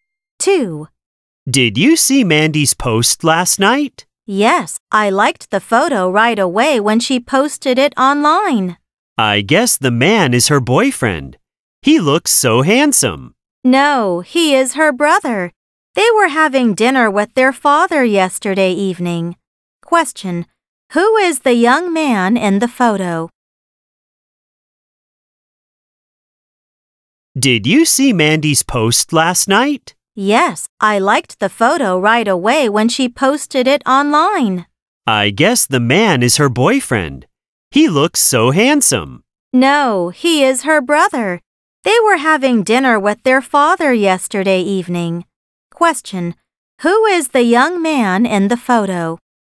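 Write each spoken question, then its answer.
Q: who is the young man in the photo?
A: Mandy's brother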